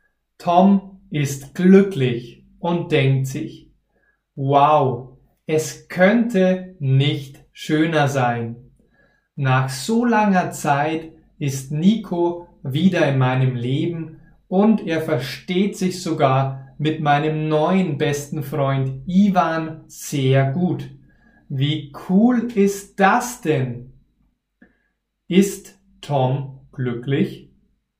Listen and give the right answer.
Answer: Ja, er ist glücklich.